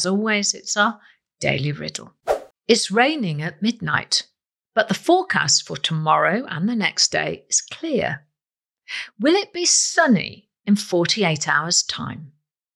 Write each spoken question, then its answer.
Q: Will it be sunny in 48 hours' time?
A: And the answer is no, it won't be sunny in 48 hours' time.